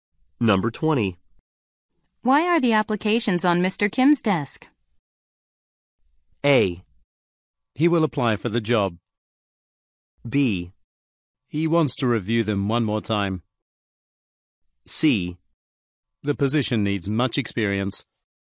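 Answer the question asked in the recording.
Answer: B: He wants to review them one more time.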